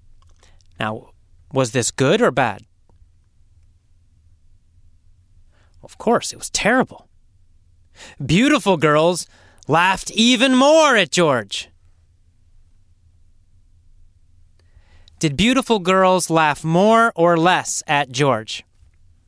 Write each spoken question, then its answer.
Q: Did beautiful girls laugh more or less at George?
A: More. They laughed more.